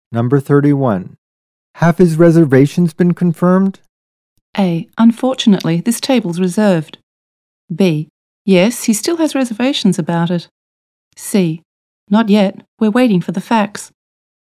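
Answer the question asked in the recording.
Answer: C: Not yet. We're waiting for the facts.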